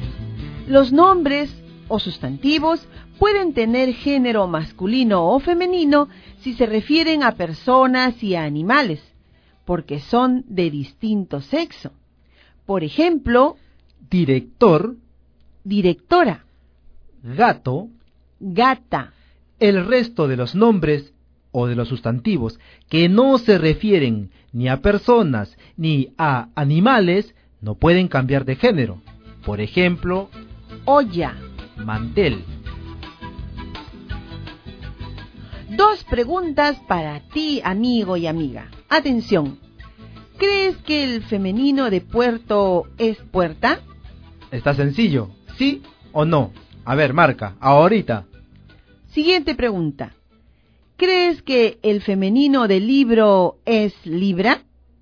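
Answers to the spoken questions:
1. No
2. No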